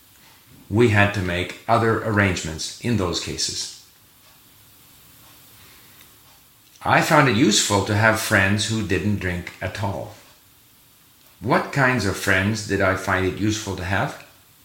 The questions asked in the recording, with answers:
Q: What kinds of friends did I find it useful to have?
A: I found it useful to have friends who didn't drink at all.